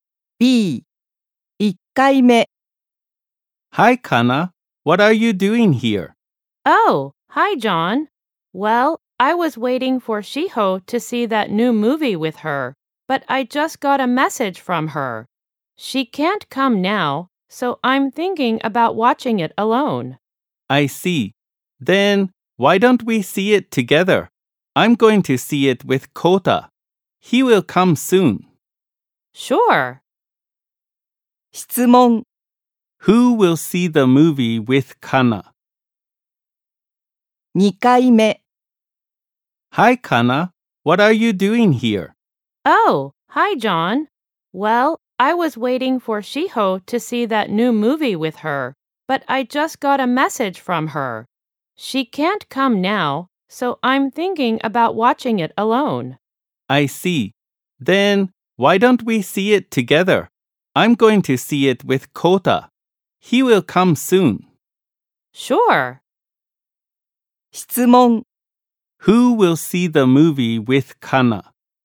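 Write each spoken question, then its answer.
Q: Who will see the movie with Kana?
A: John and Kota.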